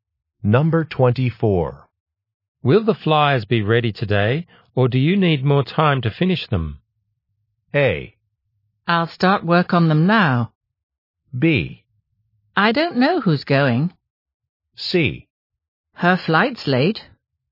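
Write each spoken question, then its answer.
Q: Will the flyers be ready today, or do you need more time to finish them?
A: A: I'll start work on them now.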